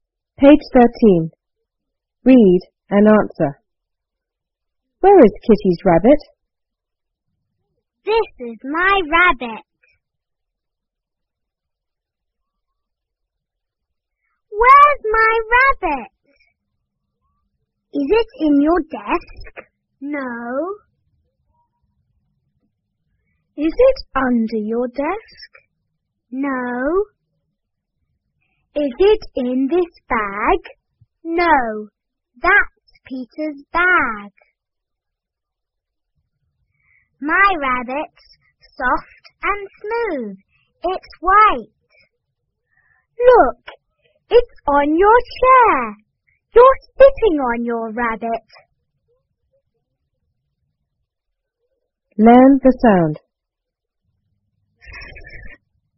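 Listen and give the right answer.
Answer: It's on the chair (someone is sitting on it).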